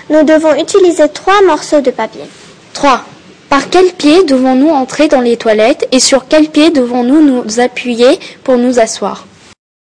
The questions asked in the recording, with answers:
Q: Par quel pied devons-nous entrer dans les toilettes et sur quel pied devons-nous nous appuyer pour nous asseoir?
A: Nous devons entrer par le pied gauche et nous appuyer sur ce même pied pour nous asseoir.